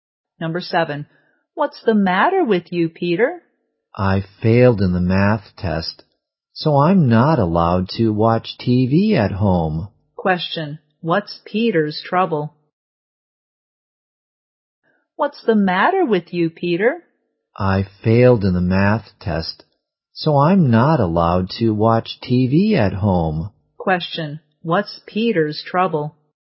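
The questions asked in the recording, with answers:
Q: what's Peter's trouble?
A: He failed the math test and isn't allowed to watch TV at home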